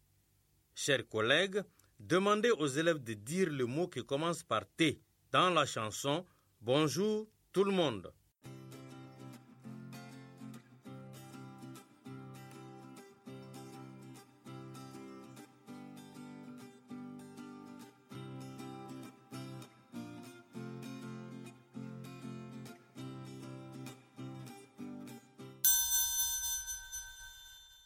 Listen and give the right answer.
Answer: j'espère que vous avez dit le mot « tout ».